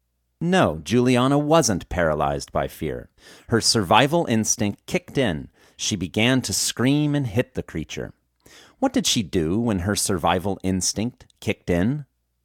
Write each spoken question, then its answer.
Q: What did she do when her survival instinct kicked in?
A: She began to scream and hit the creature when her survival instinct kicked in.